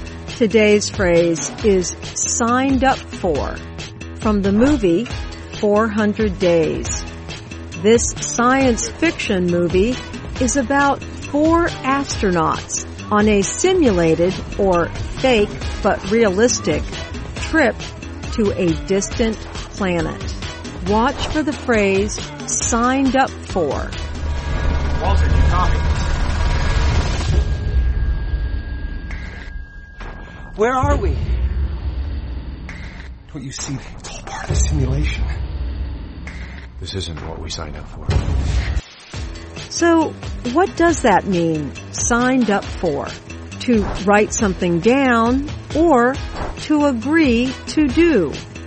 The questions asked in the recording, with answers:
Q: So, what does that mean, signed up for?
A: Signed up for means something you agreed to do.